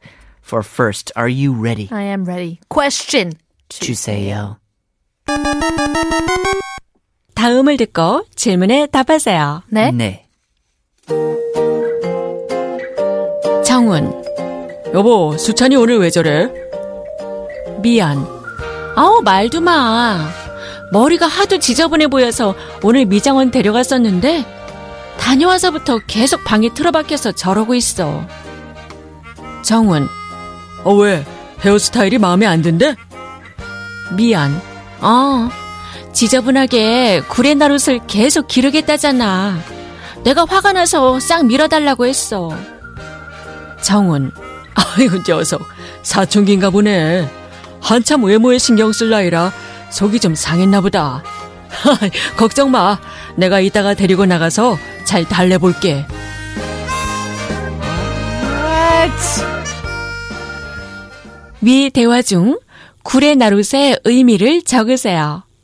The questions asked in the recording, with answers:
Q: 위 대화 중 구레나룻의 의미를 적으세요.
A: Sideburns.